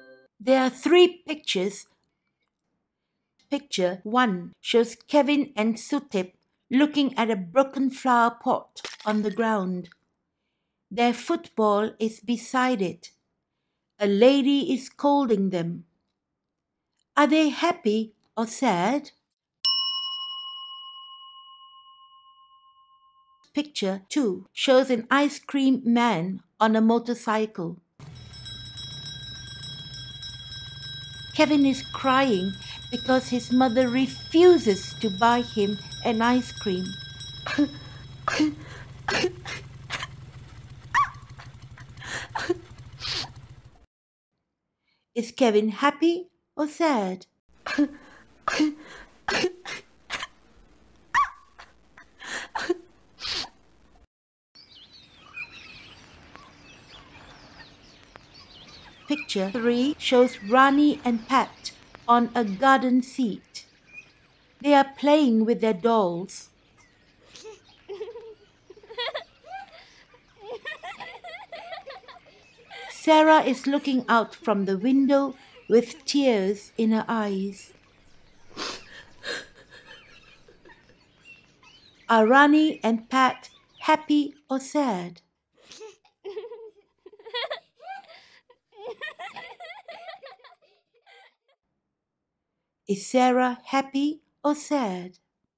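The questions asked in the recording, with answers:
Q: Are they happy or sad?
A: sad

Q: Is Kevin happy or sad?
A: sad

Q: Are Rani and Pat happy or sad?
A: happy

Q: Is Sarah happy or sad?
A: sad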